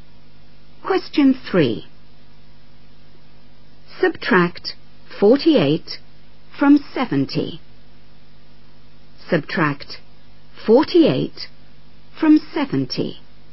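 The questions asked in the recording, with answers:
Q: Subtract 48 from 70.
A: 22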